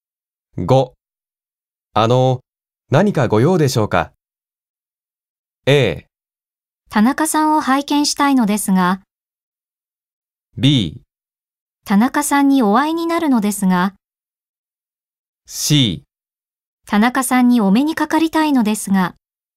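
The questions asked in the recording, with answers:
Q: 何かご用でしょうか?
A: C: 田中さんにお目にかかりたいのですが。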